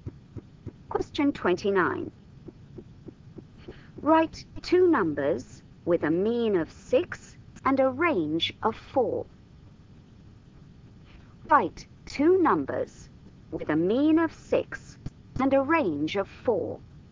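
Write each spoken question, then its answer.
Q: Write two numbers with a mean of 6 and a range of 4.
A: 4 and 8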